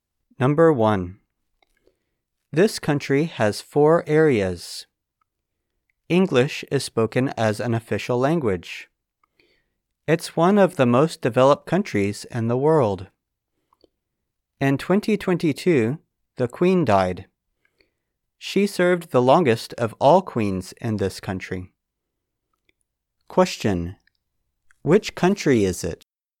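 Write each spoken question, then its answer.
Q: Which country is it?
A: The United Kingdom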